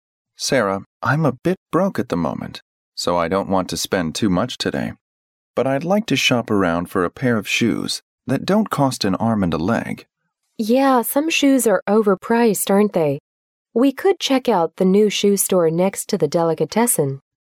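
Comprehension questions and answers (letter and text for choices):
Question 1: What sort of shoes would the man buy?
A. An expensive pair of shoes.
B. An affordable pair of shoes.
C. A pair of trainers.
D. A stout pair of shoes.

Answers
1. B. An affordable pair of shoes.

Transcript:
M: Sarah, I'm a bit broke at the moment, so I don't want to spend too much today, but I'd like to shop around for a pair of shoes that don't cost an arm and a leg.
W: Yeah, some shoes are over-priced, aren't they? We could check out the new shoe store next to the delicatessen.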